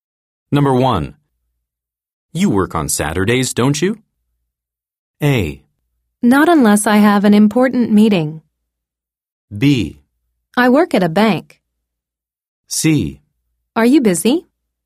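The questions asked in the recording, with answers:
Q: You work on Saturdays, don't you?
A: A: Not unless I have an important meeting.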